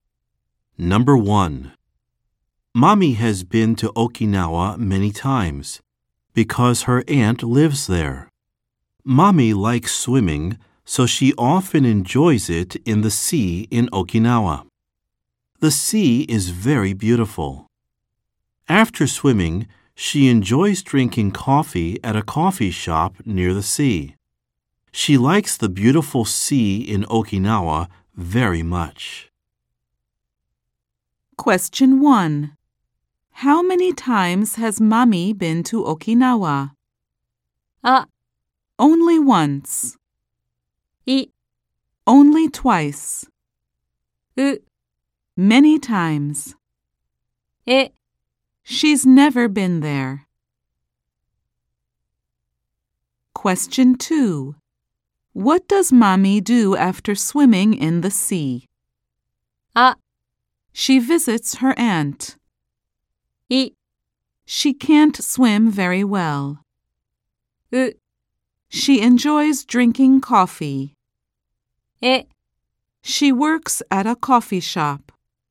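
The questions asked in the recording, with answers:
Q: How many times has Mommy been to Okinawa?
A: う: Many times.

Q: What does Mommy do after swimming in the sea?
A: う: She enjoys drinking coffee.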